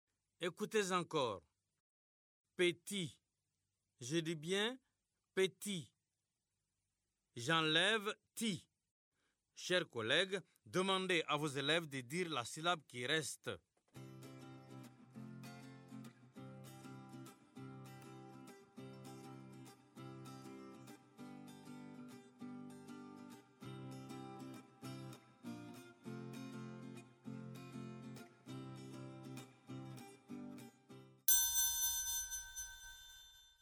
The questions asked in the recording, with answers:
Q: J'enlève ti. Chers collègues, demandez à vos élèves de dire la syllabe qui reste.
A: Il reste P.